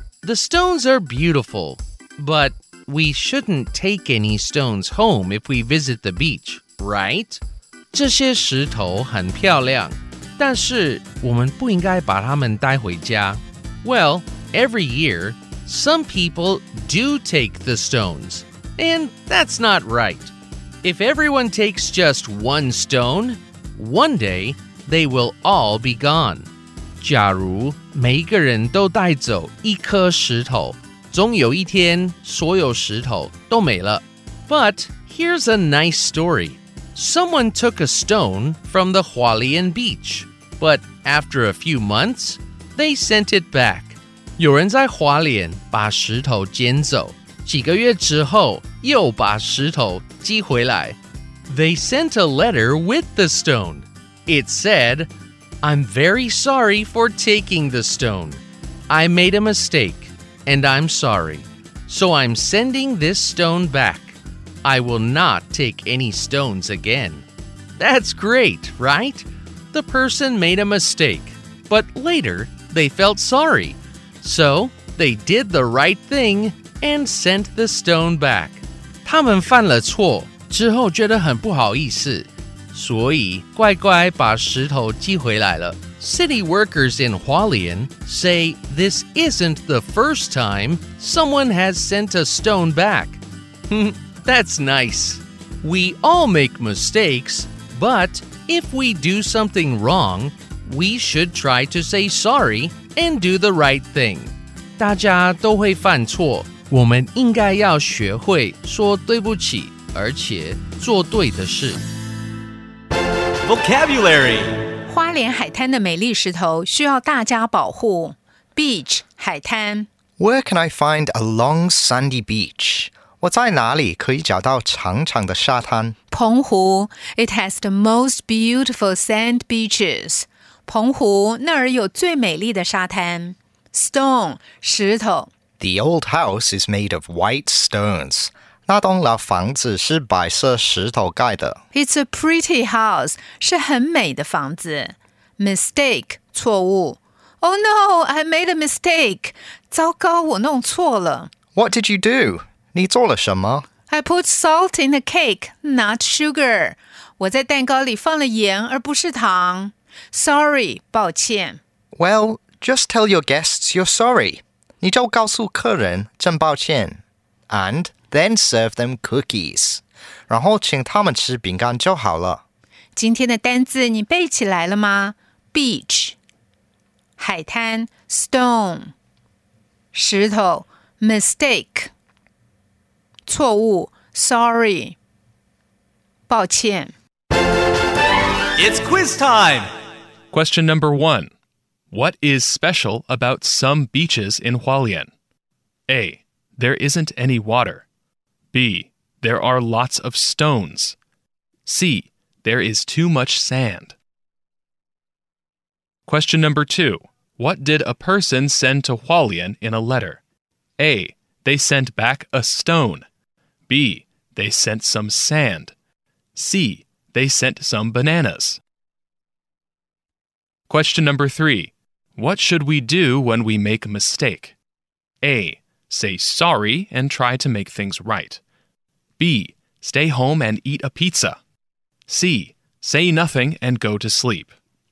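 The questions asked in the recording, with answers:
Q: What is special about some beaches in Hualien?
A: B: There are lots of stones.

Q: What did a person send to Hualien in a letter?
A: A: They sent back a stone.

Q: What should we do when we make a mistake?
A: A: Say sorry and try to make things right.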